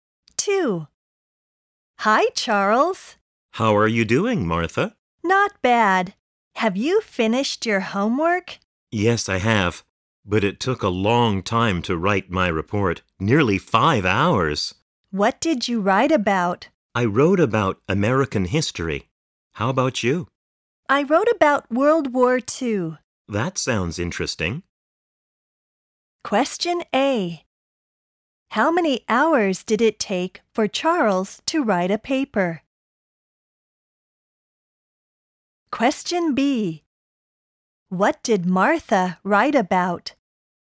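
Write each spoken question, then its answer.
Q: How many hours did it take for Charles to write a paper?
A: Nearly 5 hours

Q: What did Martha write about?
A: World War II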